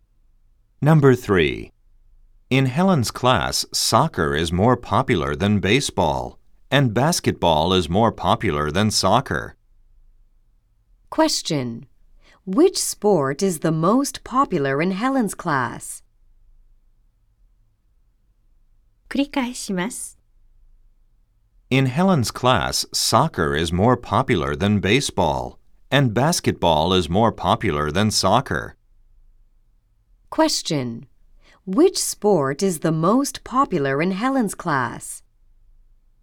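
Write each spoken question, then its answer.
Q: Which sport is the most popular in Helen's class?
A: Basketball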